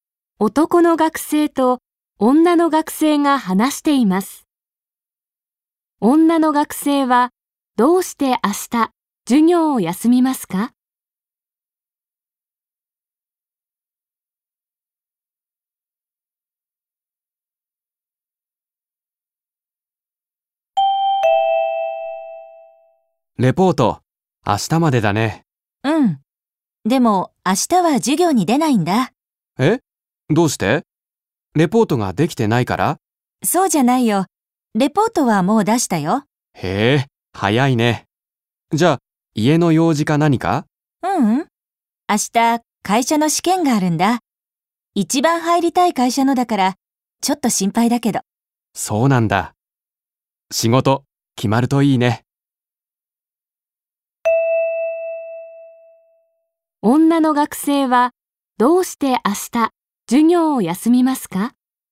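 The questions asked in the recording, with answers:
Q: 女の学生はどうして明日授業を休みますか?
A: 会社の試験があるから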